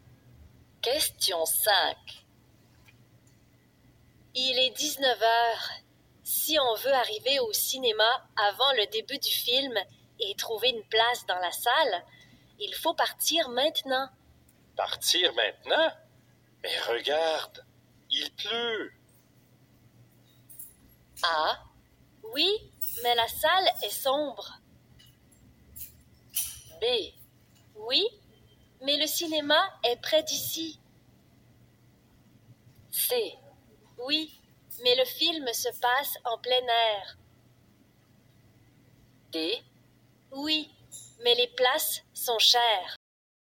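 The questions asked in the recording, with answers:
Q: Partir maintenant? Mais regarde, il pleut.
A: B: Oui, mais le cinéma est près d'ici.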